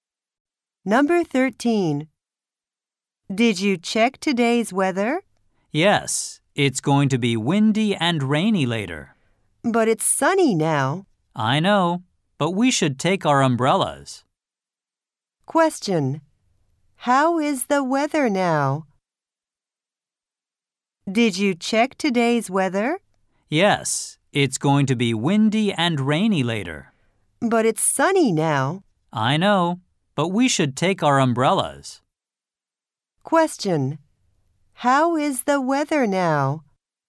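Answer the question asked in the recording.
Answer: Sunny.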